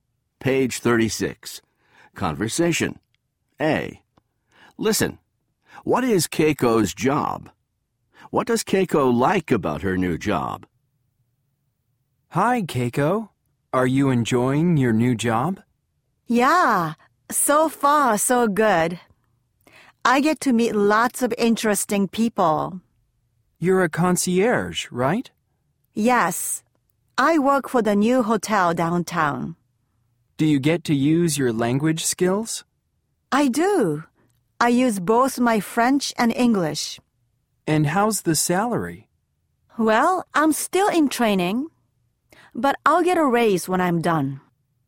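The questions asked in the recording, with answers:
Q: What is Keiko's job?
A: She is a concierge at the new hotel downtown.

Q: What does Keiko like about her new job?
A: She gets to meet lots of interesting people.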